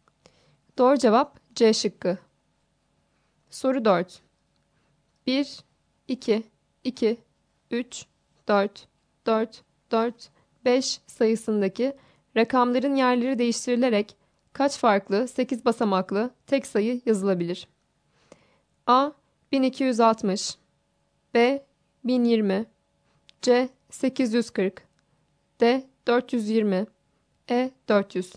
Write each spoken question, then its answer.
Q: 1, 2, 2, 3, 4, 4, 4, 5 sayısındaki rakamların yerleri değiştirilerek kaç farklı 8 basamaklı tek sayı yazılabilir?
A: Doğru cevap A şıkkı.